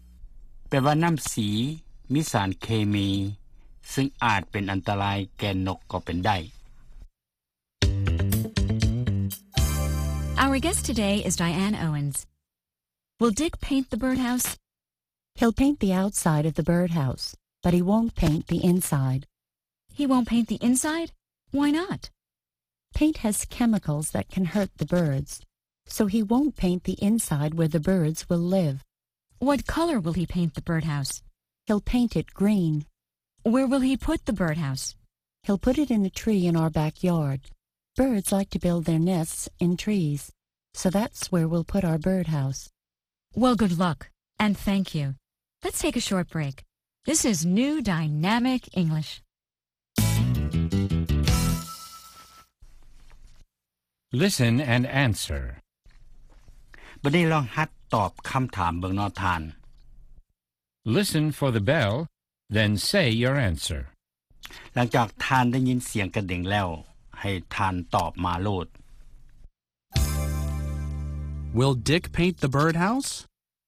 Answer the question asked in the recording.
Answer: He'll paint the outside, but he won't paint the inside.